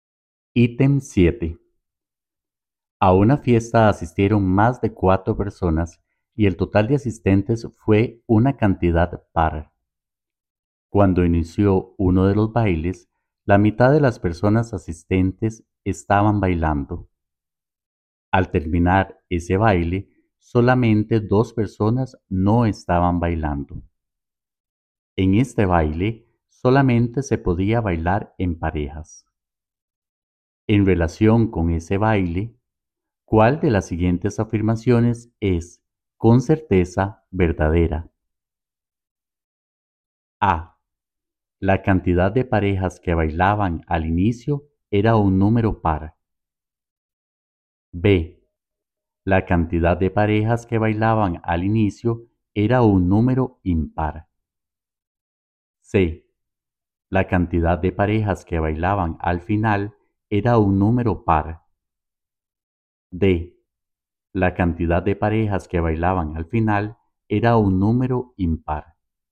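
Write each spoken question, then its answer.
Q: En relación con ese baile, ¿cuál de las siguientes afirmaciones es, con certeza, verdadera?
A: D: La cantidad de parejas que bailaban al final era un número impar.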